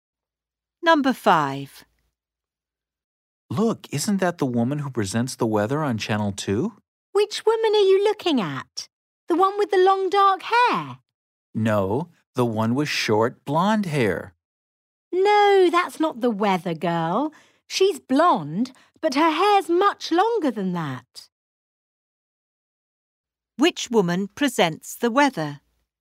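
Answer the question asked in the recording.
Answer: The woman with long blonde hair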